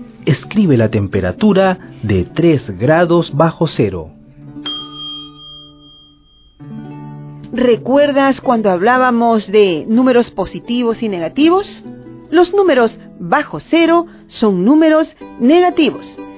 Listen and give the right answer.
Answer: Menos 3 grados.